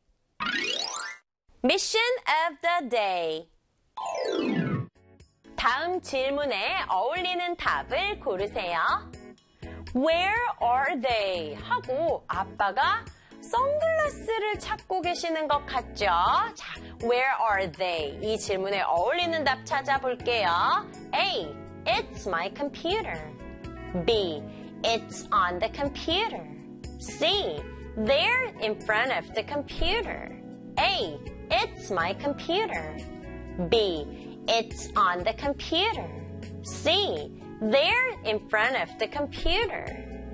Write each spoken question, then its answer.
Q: Where are they?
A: 자, 정답은 3, 2, 1. C가 되겠죠.